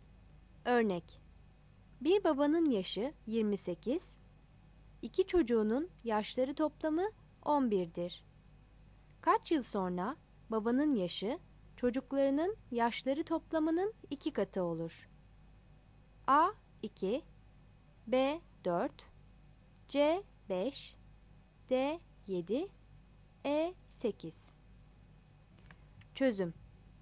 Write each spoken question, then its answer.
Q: Kaç yıl sonra babanın yaşı çocuklarının yaşları toplamının 2 katı olur?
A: Yanıt A'dır.